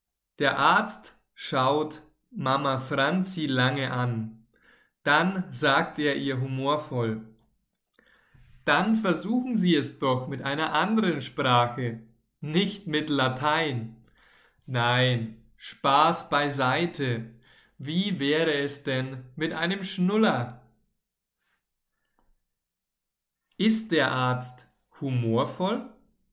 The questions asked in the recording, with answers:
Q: Ist der Arzt humorvoll?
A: Ja, der Arzt ist sehr humorvoll.